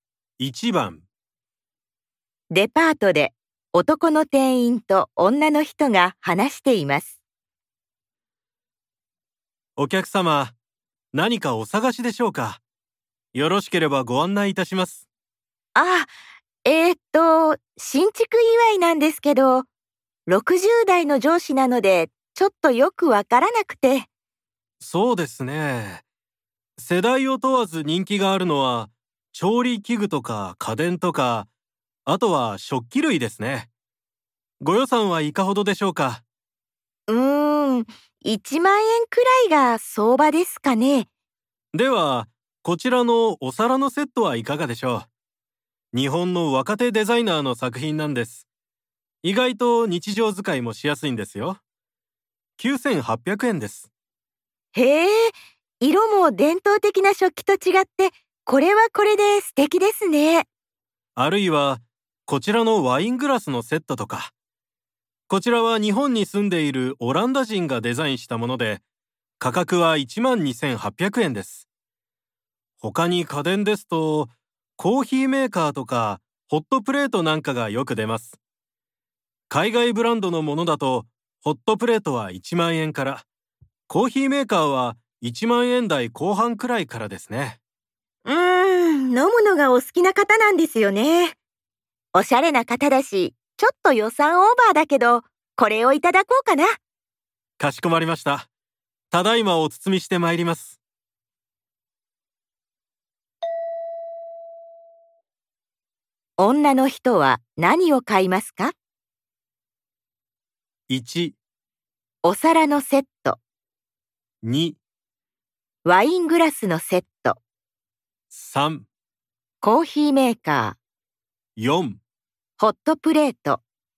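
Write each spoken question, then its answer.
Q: 女の人は何を買いますか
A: 2: ワイングラスのセット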